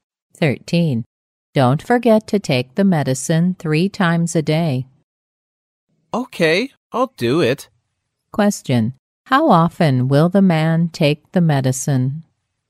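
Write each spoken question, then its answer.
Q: How often will the man take the medicine?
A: 3 times a day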